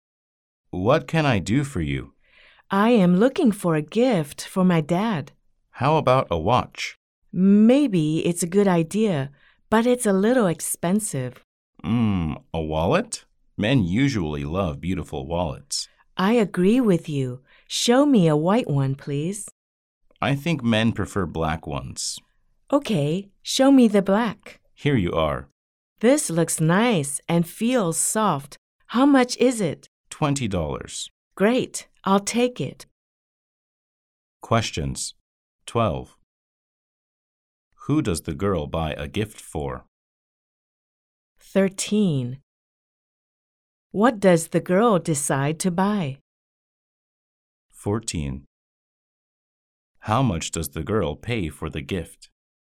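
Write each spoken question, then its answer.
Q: Who does the girl buy a gift for?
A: Her dad

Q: What does the girl decide to buy?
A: A black wallet

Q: How much does the girl pay for the gift?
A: $20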